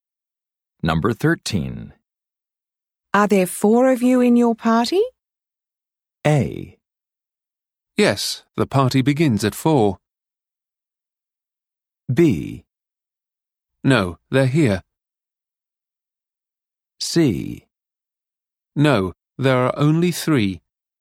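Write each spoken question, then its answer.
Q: Are there four of you in your party?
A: C: No, there are only 3.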